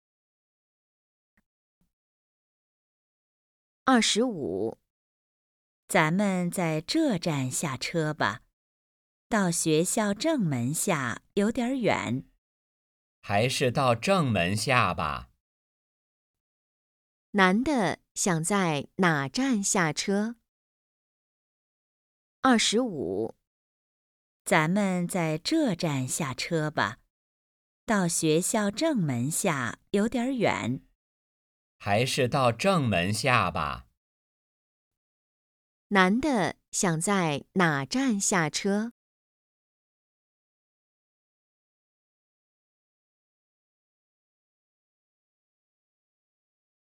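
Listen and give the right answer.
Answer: 学校正门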